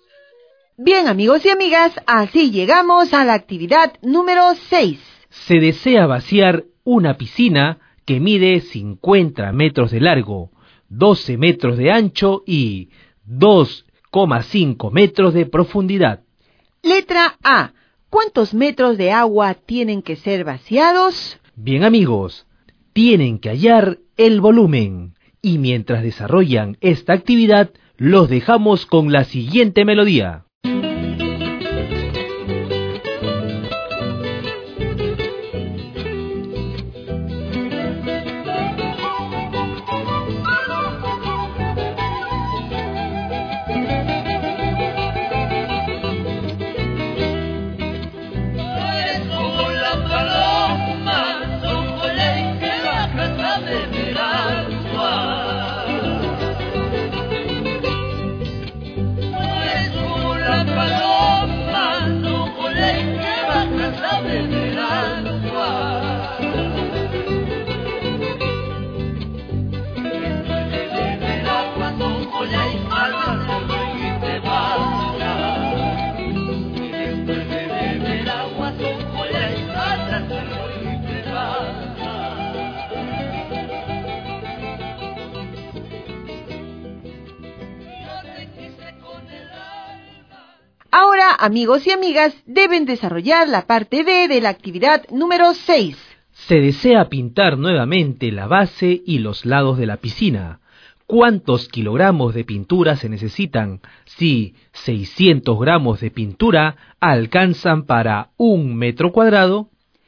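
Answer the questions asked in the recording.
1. 1500 m3
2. 546 kg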